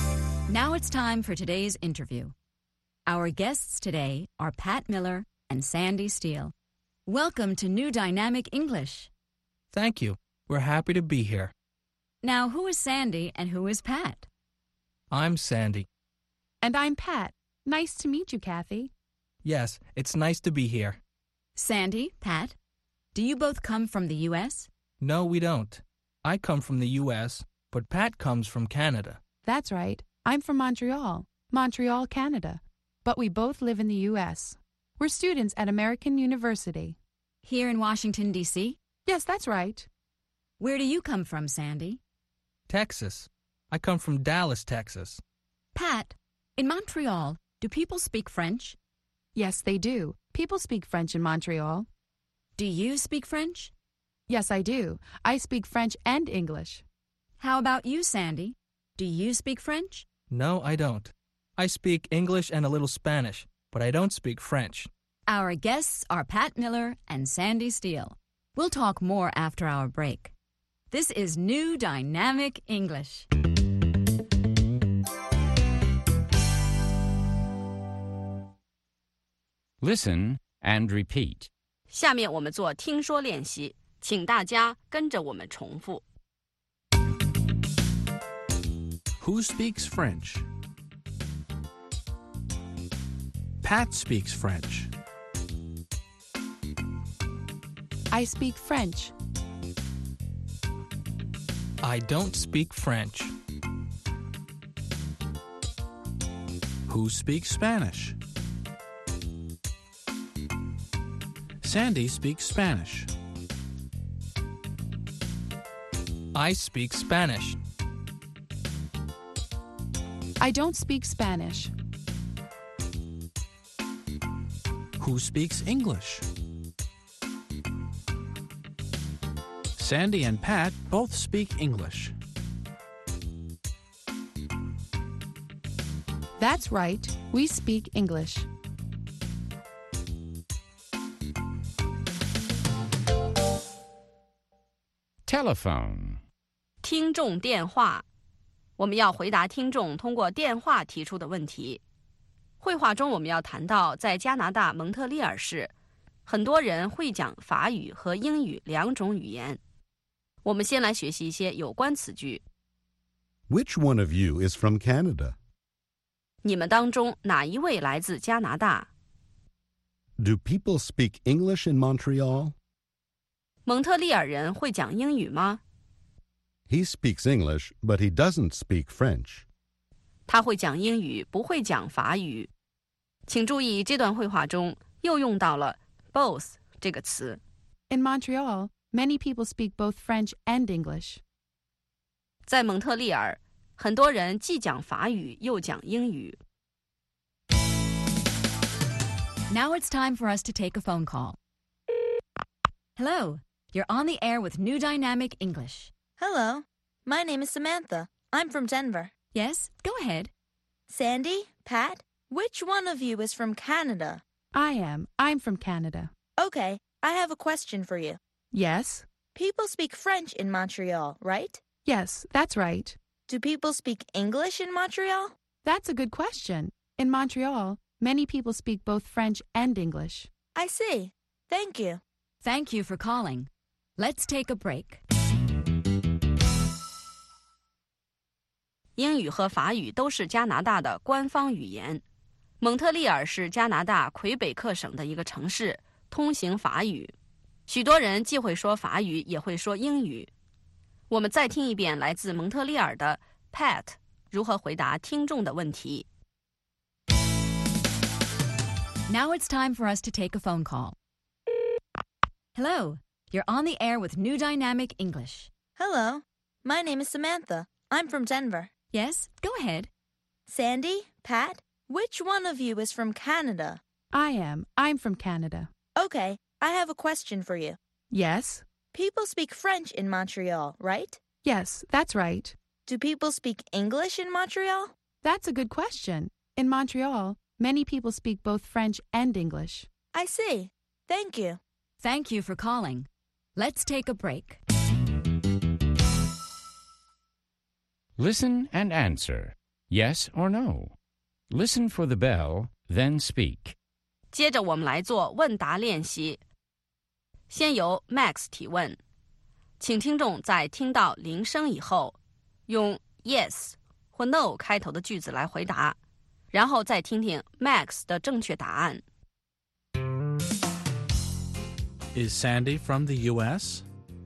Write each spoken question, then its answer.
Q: Is Sandy from the U.S.?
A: Yes, he is. He's from the U.S.